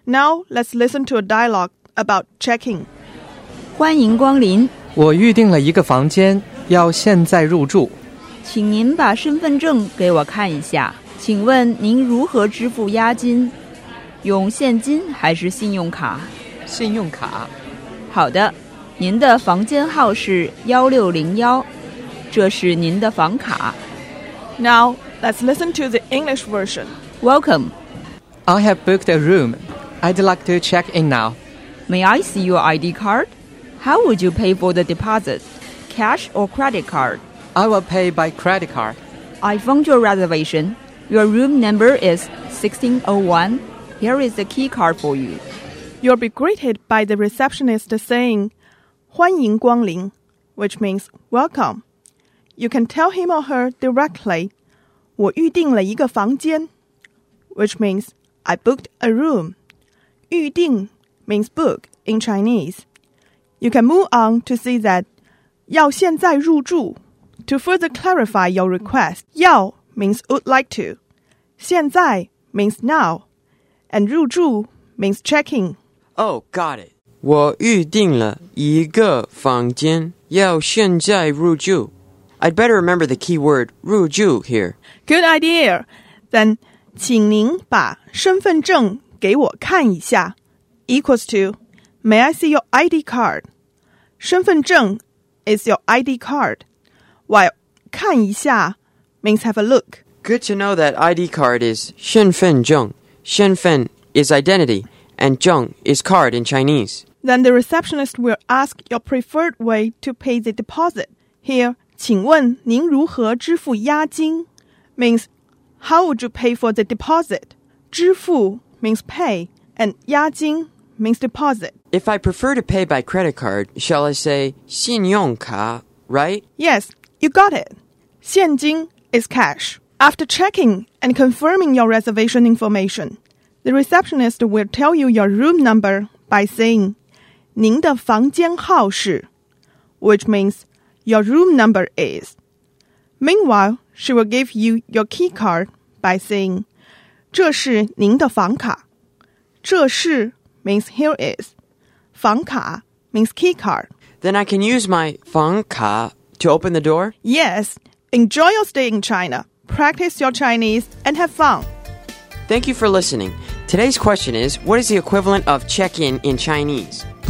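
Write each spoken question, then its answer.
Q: what is the equivalent of check-in in Chinese?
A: 入住 (rùzhù)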